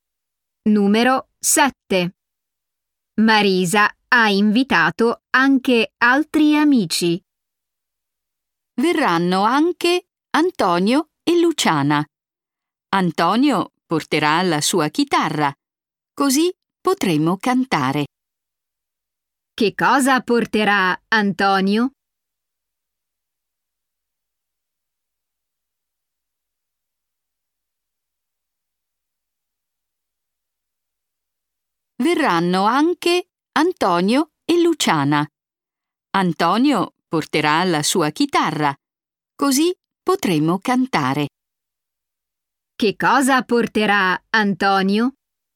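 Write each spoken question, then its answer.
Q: Che cosa porterà Antonio?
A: La sua chitarra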